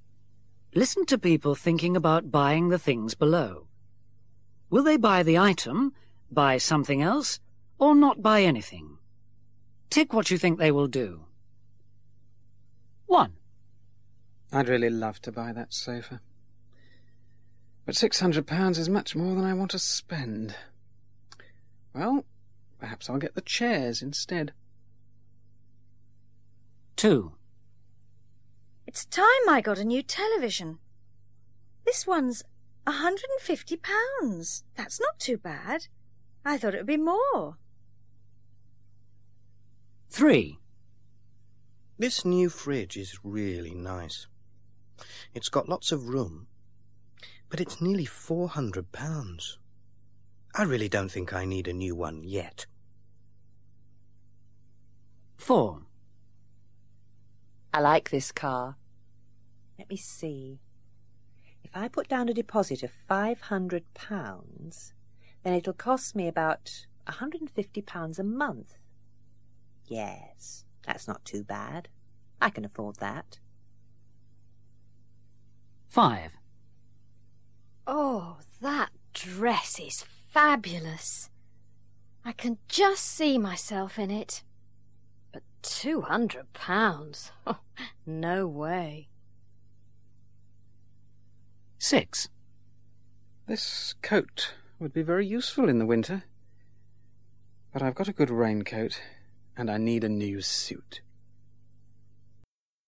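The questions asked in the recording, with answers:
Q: Will they buy the item, buy something else, or not buy anything?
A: buy something else

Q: Will they buy the item, buy something else, or not buy anything?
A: buy the item

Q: Will they buy the item, buy something else, or not buy anything?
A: not buy anything

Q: Will they buy the item, buy something else, or not buy anything?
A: buy the item

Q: Will they buy the item, buy something else, or not buy anything?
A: not buy anything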